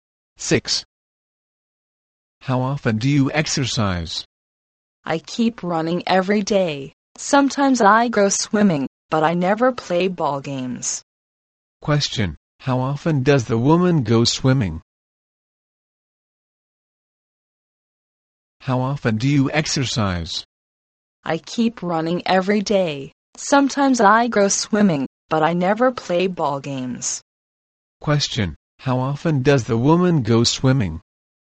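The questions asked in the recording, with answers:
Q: How often does the woman go swimming?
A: Sometimes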